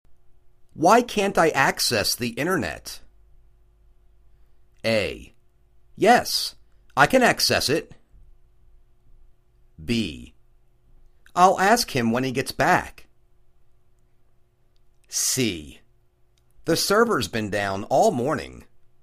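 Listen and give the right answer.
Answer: C: The server's been down all morning.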